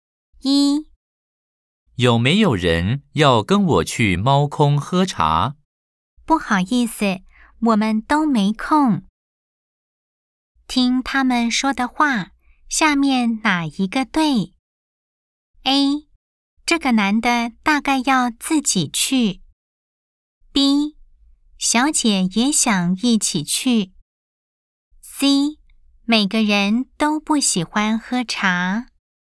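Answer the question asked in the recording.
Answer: A: 这个男的大概要自己去。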